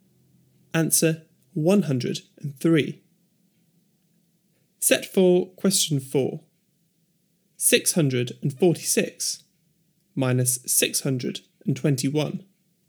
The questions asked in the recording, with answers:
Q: 646 minus 621.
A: 25.